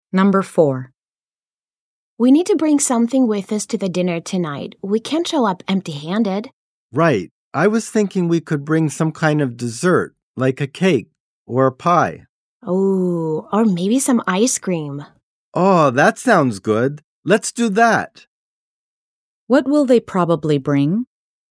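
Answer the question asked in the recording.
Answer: Ice cream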